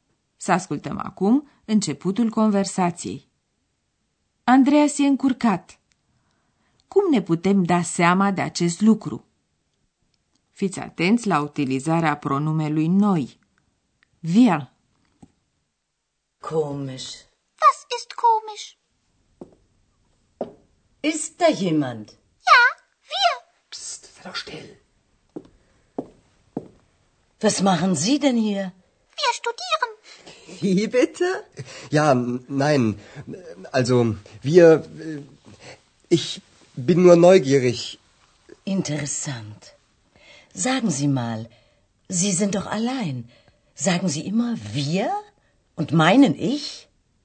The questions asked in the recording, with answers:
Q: Andreas e încurcat. Cum ne putem da seama de acest lucru?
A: Auzind vocea lui Andreas și felul cum se bâlbâie, v-ați dat seama că e încurcat.